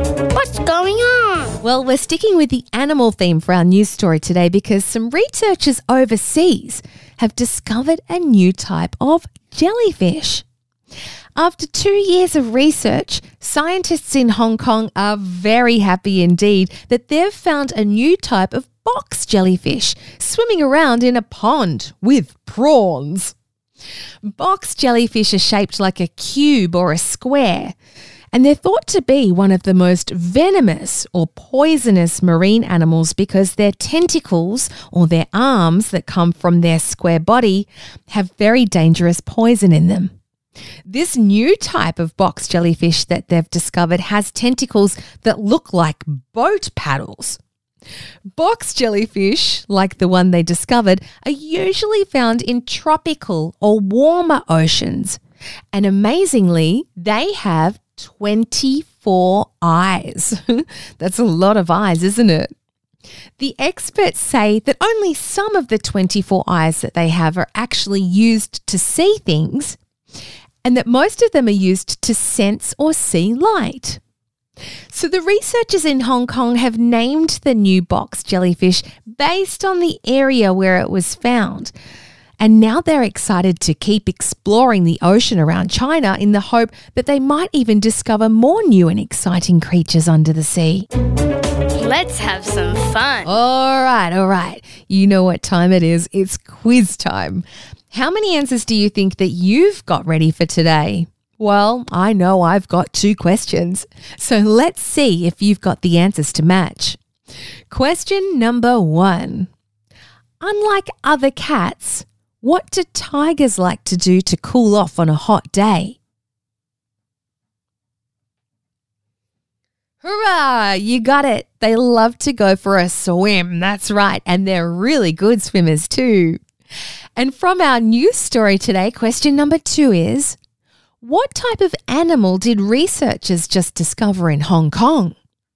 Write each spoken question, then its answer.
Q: What type of animal did researchers just discover in Hong Kong?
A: a jellyfish, a box jellyfish, in fact.